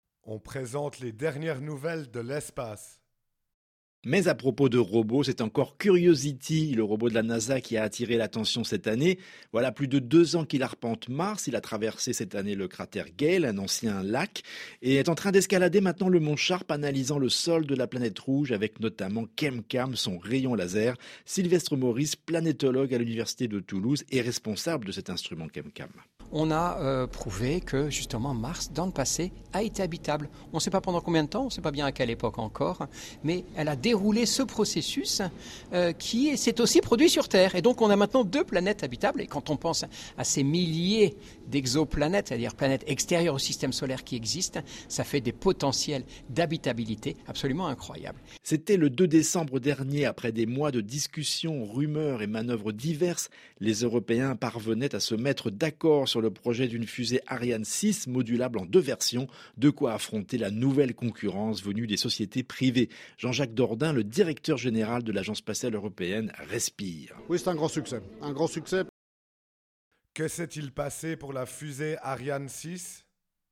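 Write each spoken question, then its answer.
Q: Que s'est-il passé pour la fusée Ariane 6 ?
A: Les Européens se sont mis d'accord sur le projet d'une fusée Ariane 6 modulable en 2 versions.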